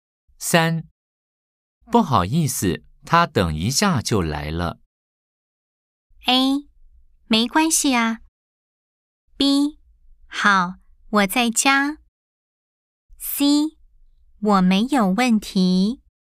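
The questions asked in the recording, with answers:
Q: 不好意思,他等一下就来了。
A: A: 没关系啊。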